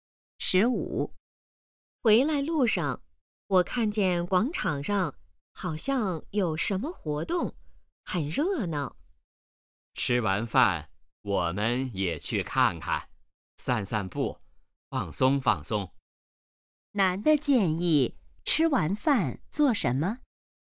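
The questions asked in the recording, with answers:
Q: 男的建议吃完饭做什么?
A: 去广场看看,散散步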